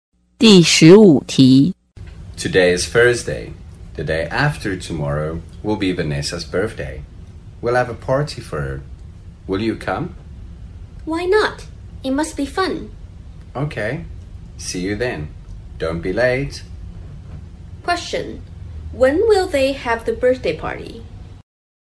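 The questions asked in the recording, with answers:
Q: When will they have the birthday party?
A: On Saturday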